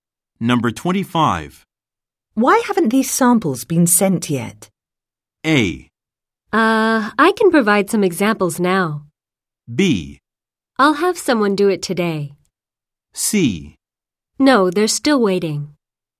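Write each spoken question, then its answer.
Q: Why haven't these samples been sent yet?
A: B: I'll have someone do it today.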